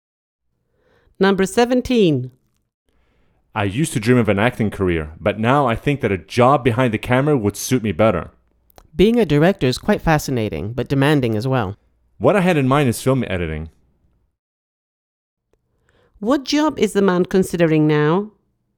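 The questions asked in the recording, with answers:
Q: What job is the man considering now?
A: film editing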